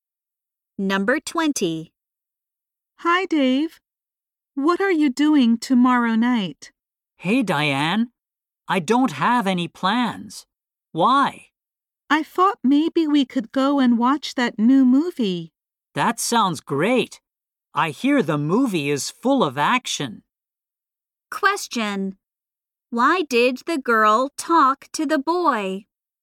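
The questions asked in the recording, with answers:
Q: Why did the girl talk to the boy?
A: To invite him to see a movie tomorrow night.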